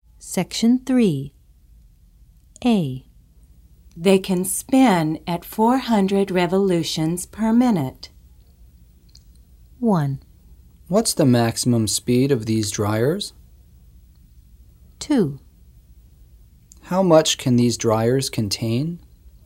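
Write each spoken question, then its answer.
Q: They can spin at 400 revolutions per minute.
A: 1: What's the maximum speed of these dryers?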